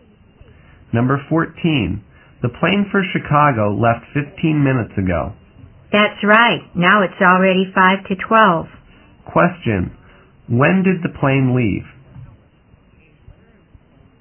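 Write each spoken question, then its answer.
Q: Question, when did the plane leave?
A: At 11:40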